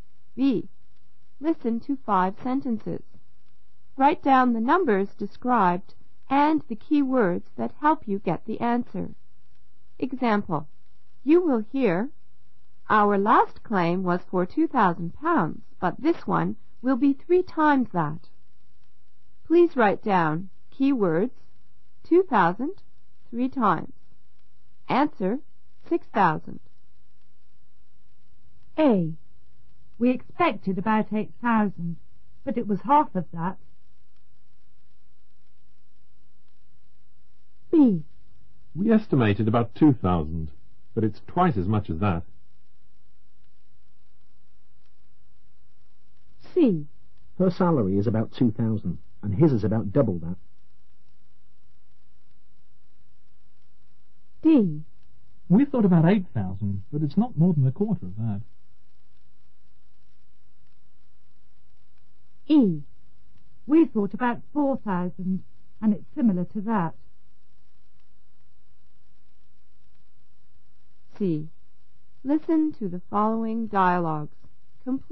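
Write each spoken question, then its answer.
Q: We expected about 8,000, but it was half of that.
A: 4,000

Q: We estimated about 2,000, but it's twice as much as that.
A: 4,000

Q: Her salary is about 2,000, and his is about double that.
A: 4,000

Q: We thought about 8,000, but it's not more than a quarter of that.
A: 2,000

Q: We thought about 4,000, and it's similar to that.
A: about 4,000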